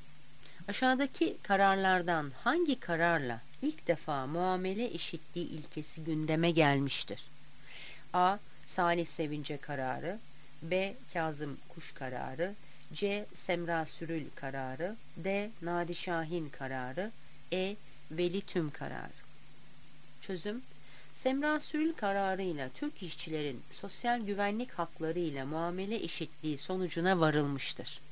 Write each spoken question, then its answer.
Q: Aşağıdaki kararlardan hangi kararla ilk defa muamele eşitliği ilkesi gündeme gelmiştir?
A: Yanıt C. Semra Sürül kararı.